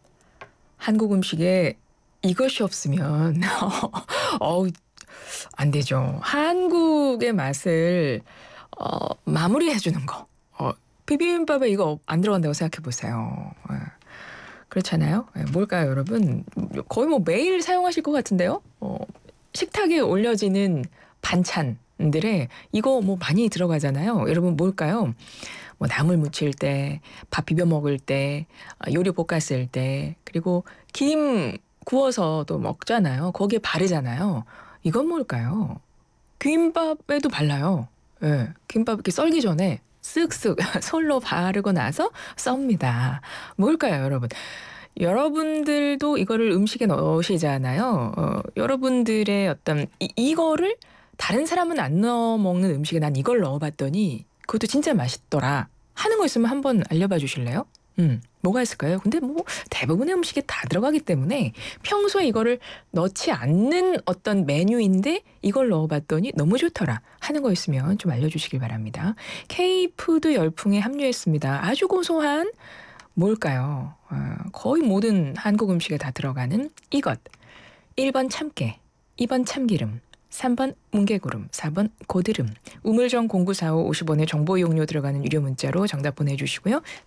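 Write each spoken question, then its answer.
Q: 거의 모든 한국 음식에 다 들어가는 이것. 1번 참깨, 2번 참기름.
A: 2번: 참기름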